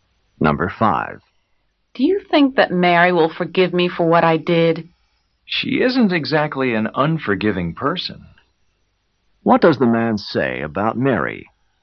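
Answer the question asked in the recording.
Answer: She is a forgiving person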